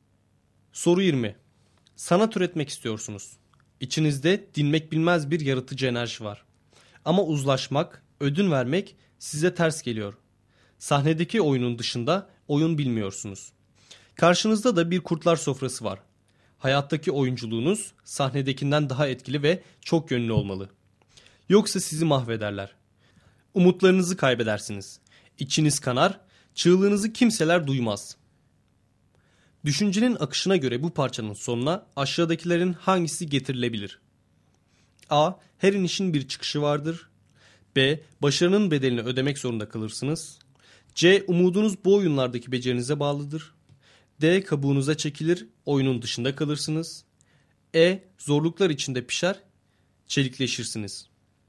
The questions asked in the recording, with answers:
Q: Düşüncenin akışına göre bu parçanın sonuna aşağıdakilerin hangisi getirilebilir?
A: Doğru cevap D şıkkı.